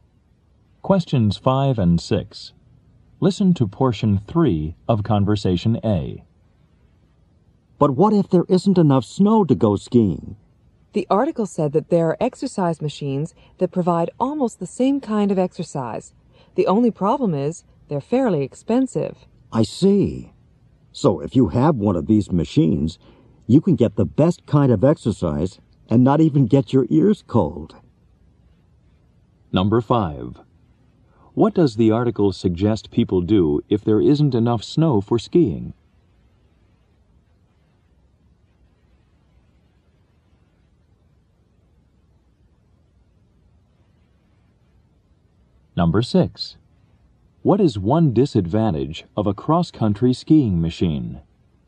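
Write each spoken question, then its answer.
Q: What does the article suggest people do if there isn't enough snow for skiing?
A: Use an exercise machine

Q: What is one disadvantage of a cross-country skiing machine?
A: It is fairly expensive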